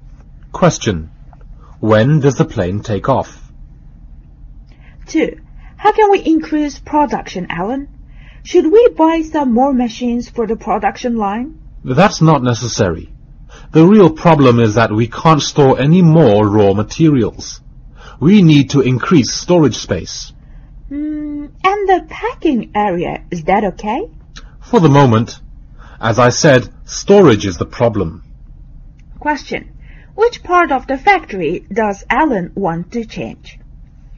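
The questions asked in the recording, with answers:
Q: Which part of the factory does Alan want to change?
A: The storage area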